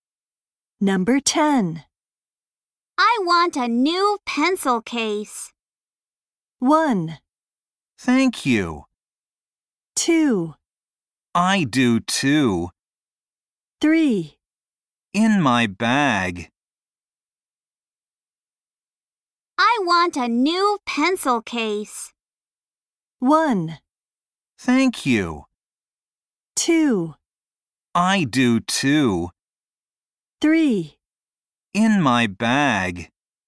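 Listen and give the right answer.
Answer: 2: I do too.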